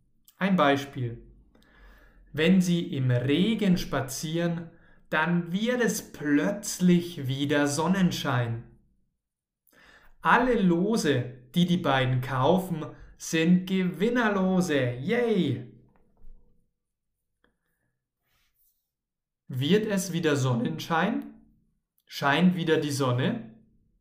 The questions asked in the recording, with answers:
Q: Wird es wieder Sonnenschein?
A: Ja, es wird wieder Sonnenschein.